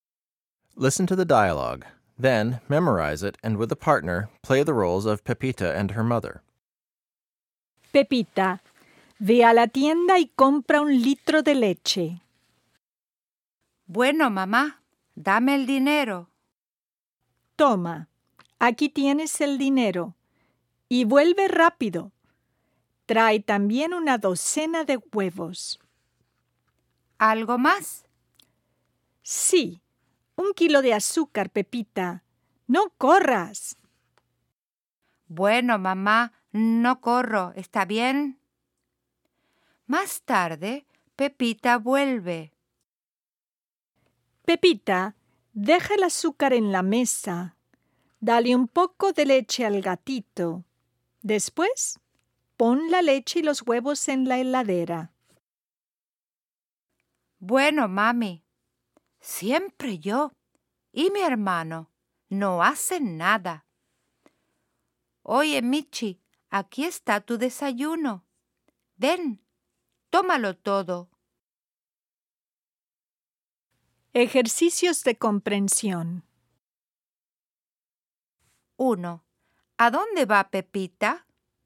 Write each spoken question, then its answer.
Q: ¿A dónde va Pepita?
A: Pepita va a la tienda.